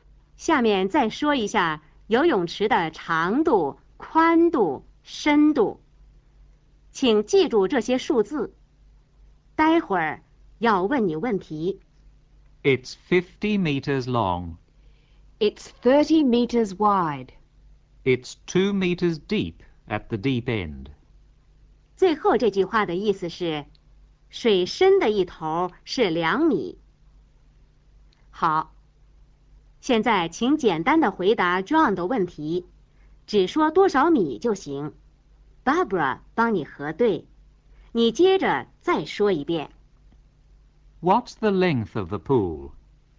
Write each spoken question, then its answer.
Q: What's the length of the pool?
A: 50 meters.